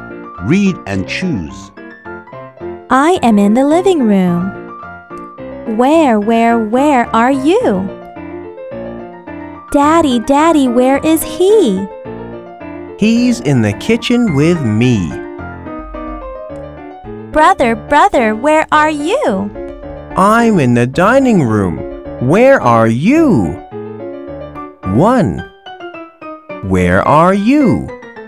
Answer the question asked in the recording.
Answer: I am in the living room.